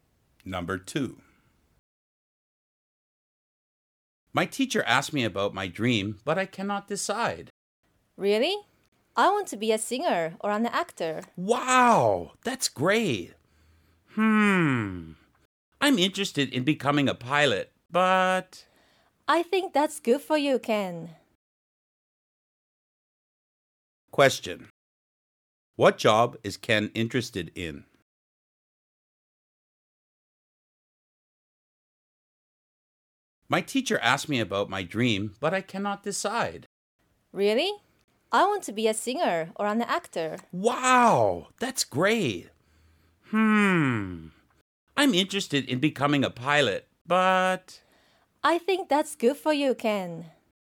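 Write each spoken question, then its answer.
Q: What job is Ken interested in?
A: A pilot.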